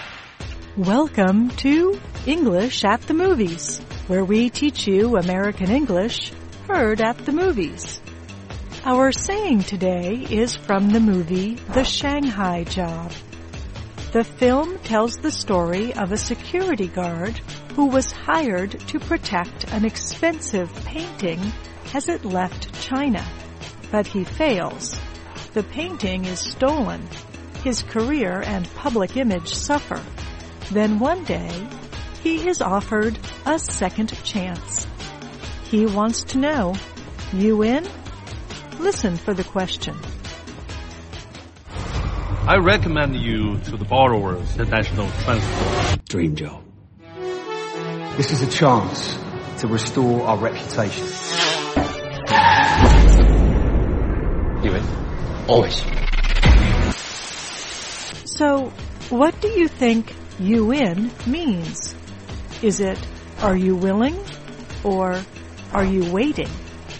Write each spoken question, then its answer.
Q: So, what do you think you in means? Is it, are you willing? Or, are you waiting?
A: You in is a short way of asking, are you willing?